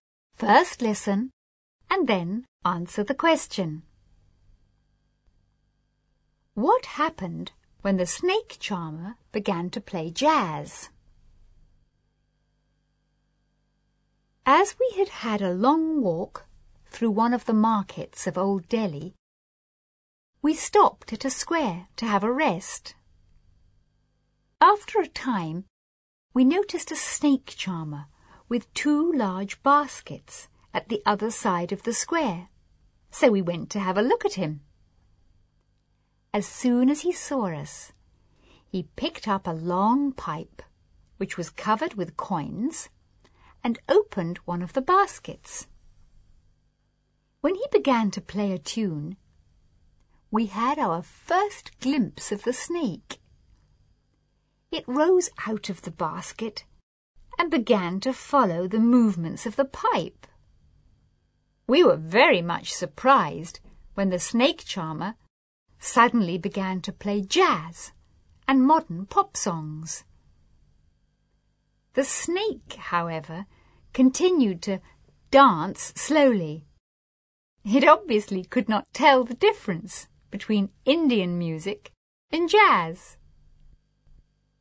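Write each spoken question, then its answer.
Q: What happened when the snake charmer began to play jazz?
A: The snake continued to dance slowly; it could not tell the difference between Indian music and jazz.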